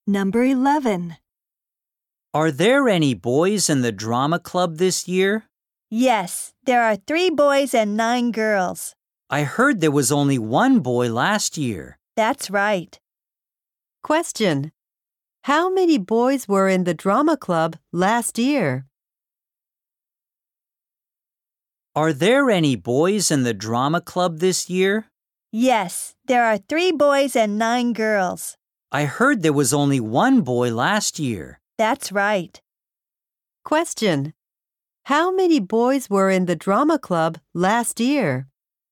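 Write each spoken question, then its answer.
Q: How many boys were in the drama club last year?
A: One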